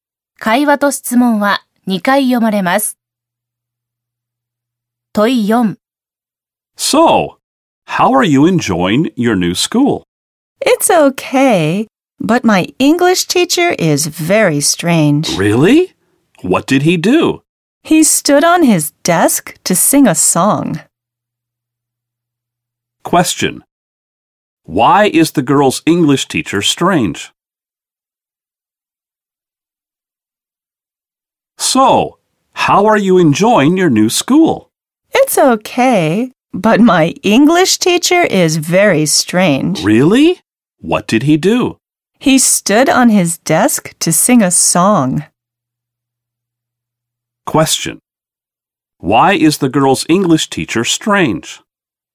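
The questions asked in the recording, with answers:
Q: Why is the girl's English teacher strange?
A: He stood on his desk to sing a song.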